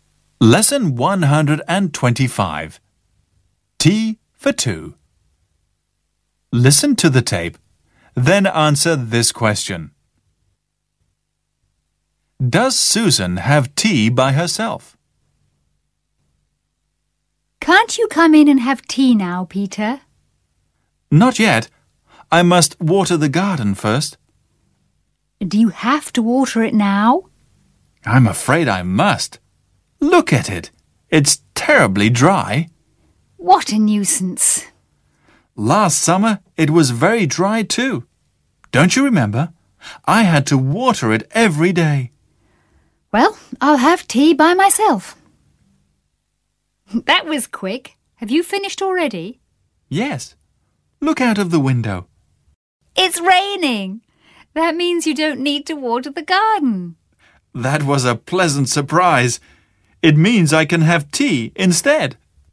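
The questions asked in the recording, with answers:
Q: Does Susan have tea by herself?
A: No, she doesn't. It starts raining, so Peter doesn't need to water the garden and has tea with her.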